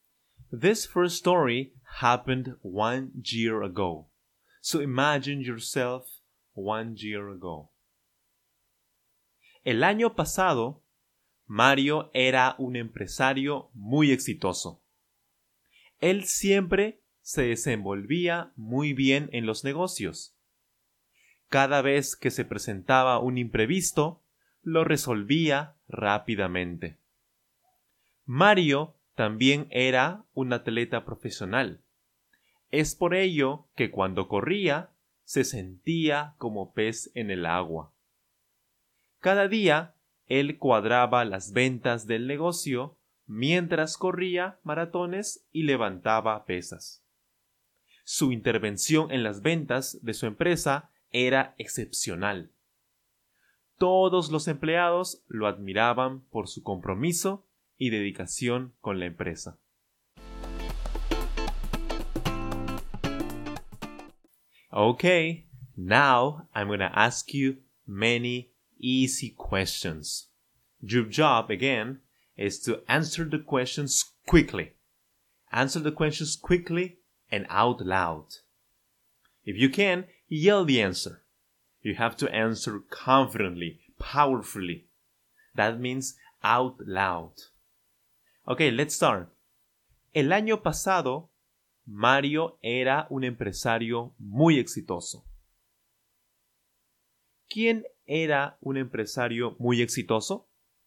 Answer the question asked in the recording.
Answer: Mario, por supuesto, Mario.